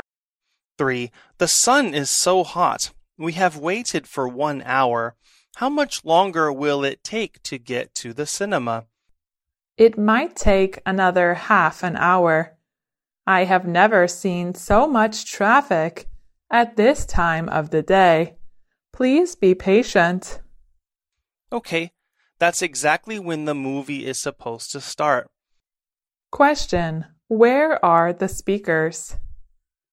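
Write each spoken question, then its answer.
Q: where are the speakers?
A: In a car, stuck in traffic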